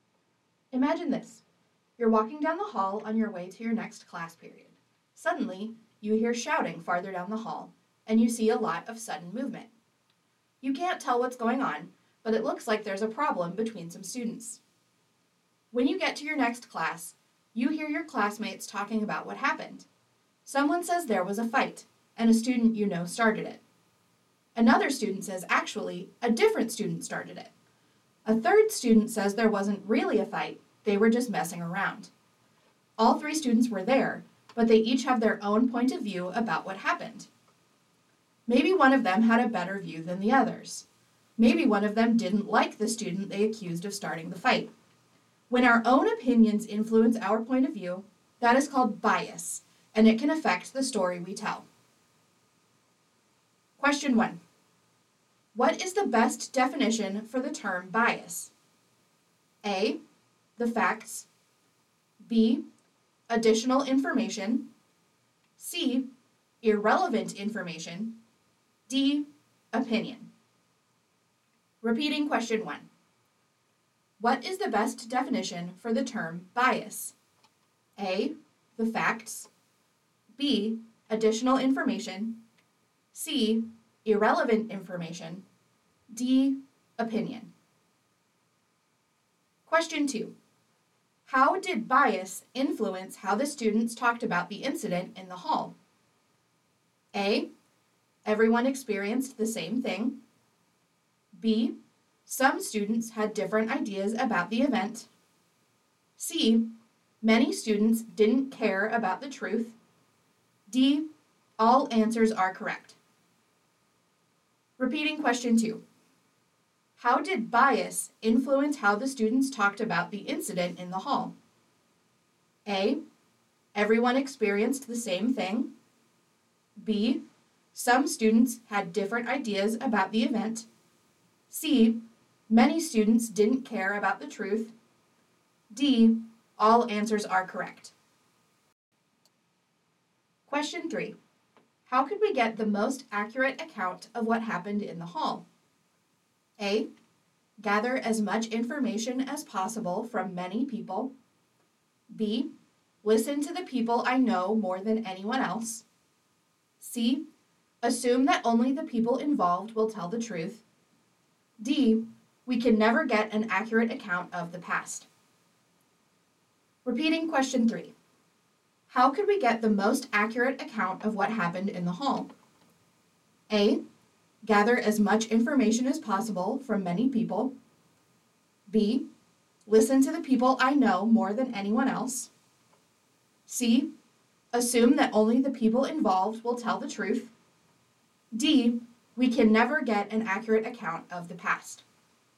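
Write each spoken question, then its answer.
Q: What is the best definition for the term bias?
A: D: Opinion.

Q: How did bias influence how the students talked about the incident in the hall?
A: B: Some students had different ideas about the event.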